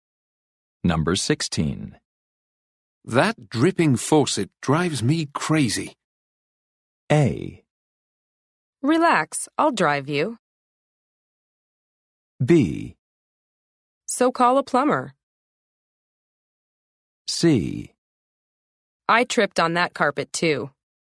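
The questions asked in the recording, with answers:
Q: That dripping faucet drives me crazy.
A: B: So call a plumber.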